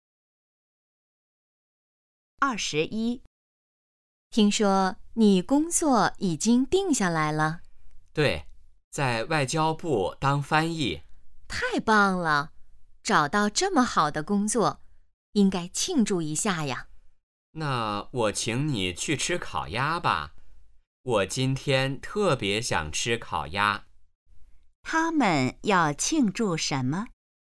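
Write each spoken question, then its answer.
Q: 他们要庆祝什么?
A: 找到了好工作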